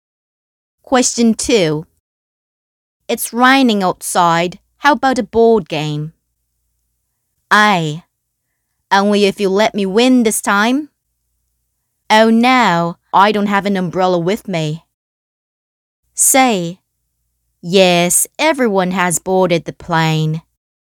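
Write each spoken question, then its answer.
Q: It's raining outside. How about a board game?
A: A: Only if you let me win this time.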